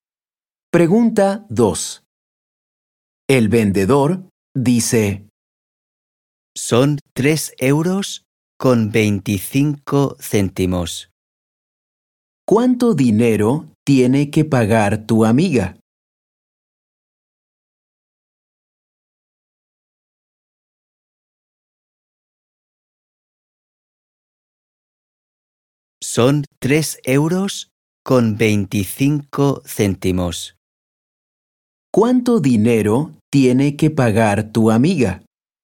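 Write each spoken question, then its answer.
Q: ¿Cuánto dinero tiene que pagar tu amiga?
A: 3 euros con 25 céntimos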